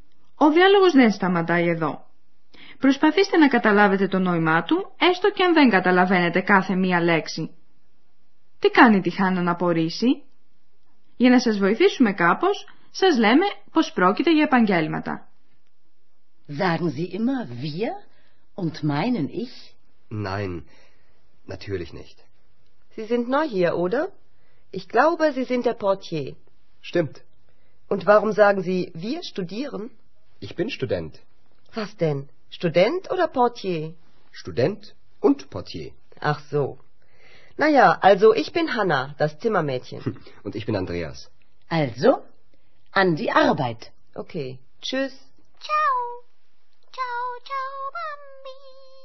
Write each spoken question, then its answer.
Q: Τι κάνει τη Χάννα να απορρίσει?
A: Η Χάννα παραξενεύεται όταν ο Ανδρέας λέει πως είναι φοιτητής, αφού προηγουμένως είχε συμφωνήσει μαζί της πως είναι θηρορός.